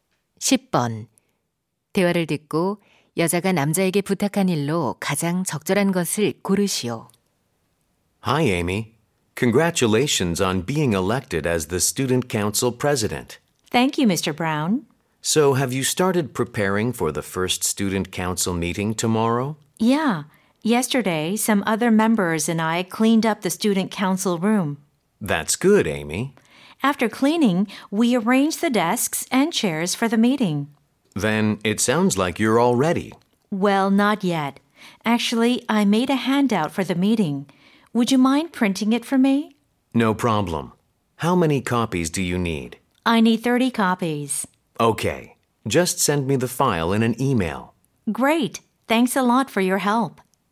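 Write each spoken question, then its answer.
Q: 대화를 듣고 여자가 남자에게 부탁한 일로 가장 적절한 것을 고르시오.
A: 회의 유인물 30부 인쇄하기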